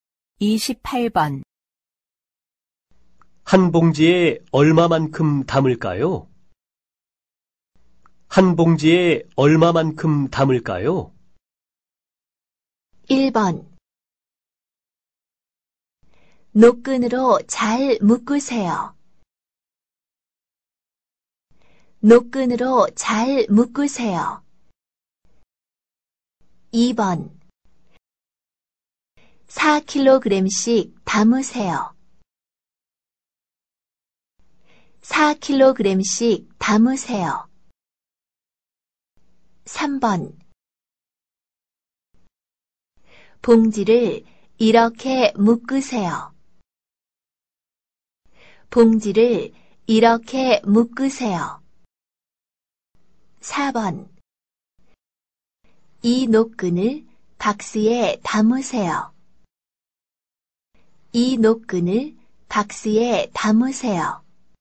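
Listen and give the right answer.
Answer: 2: 4kg씩 담으세요.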